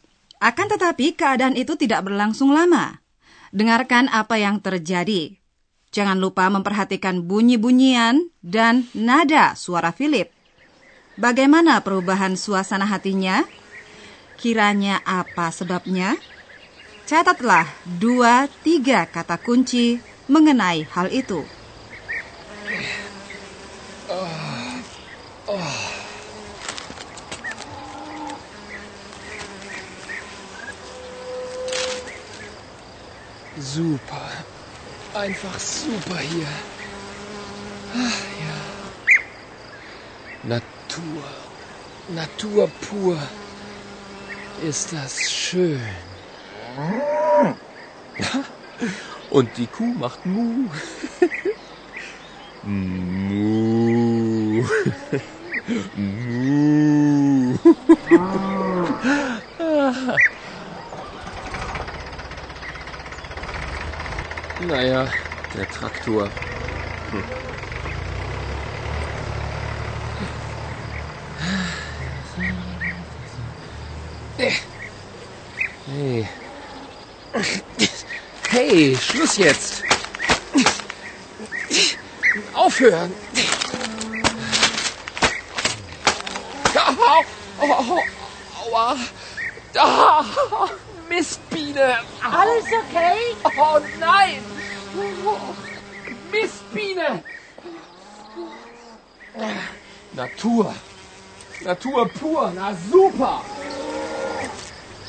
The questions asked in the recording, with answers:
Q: Bagaimana perubahan suasana hatinya?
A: Ketika Philip digigit lebah, suasana hatinya langsung berubah.